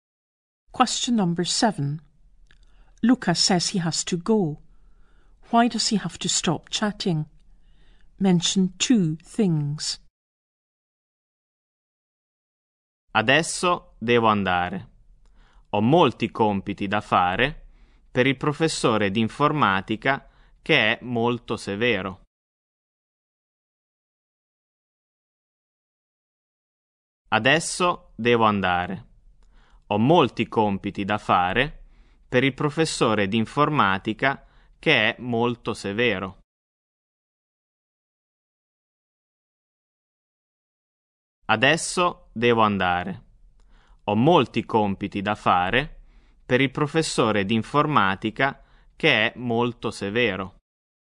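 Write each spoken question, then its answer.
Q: Why does he have to stop chatting?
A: He has lots of homework for the computing teacher, who is very strict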